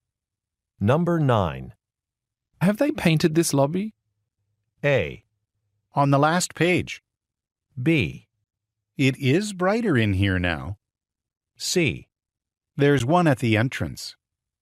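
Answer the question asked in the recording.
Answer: B: It is brighter in here now.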